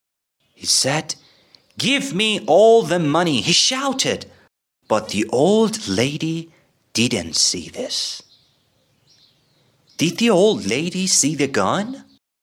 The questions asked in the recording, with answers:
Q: Did the old lady see the gun?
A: No, she didn't see the gun.